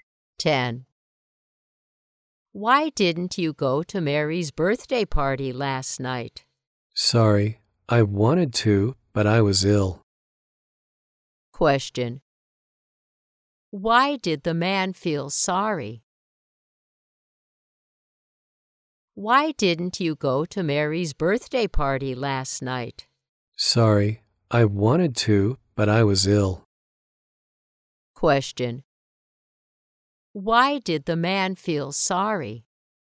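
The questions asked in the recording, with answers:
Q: Why did the man feel sorry?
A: He was ill and couldn't go to Mary's birthday party.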